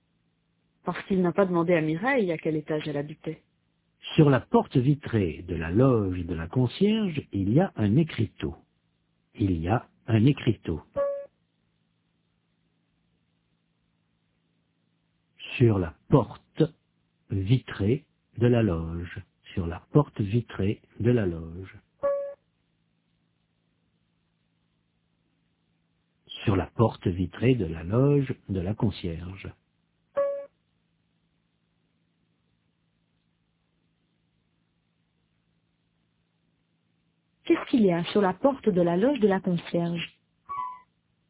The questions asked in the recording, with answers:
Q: Qu'est-ce qu'il y a sur la porte de la loge de la concierge ?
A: Un écriteau.